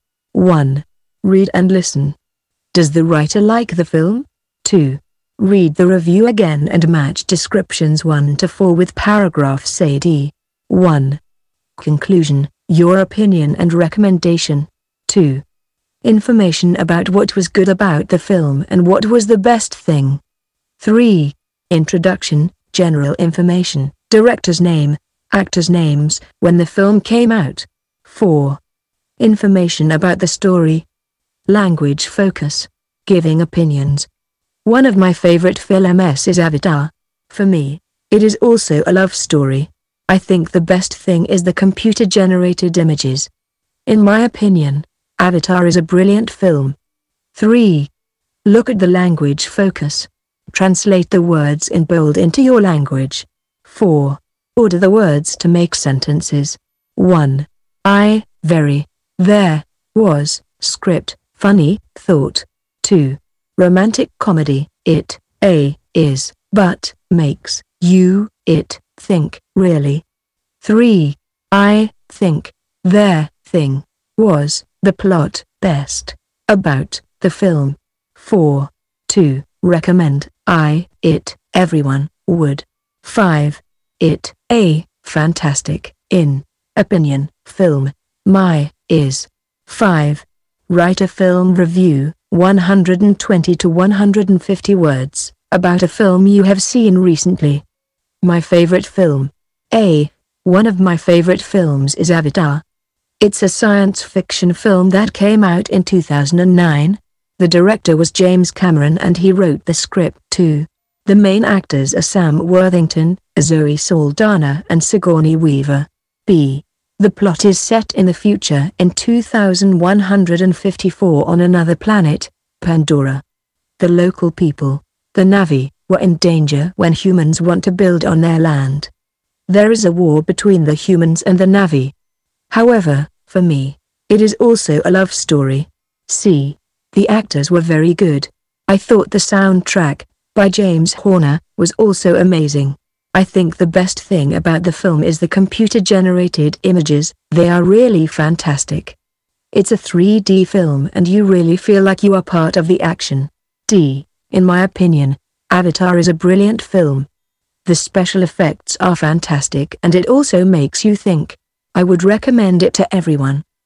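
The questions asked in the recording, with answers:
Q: Does the writer like the film?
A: Yes, the writer thinks Avatar is a brilliant film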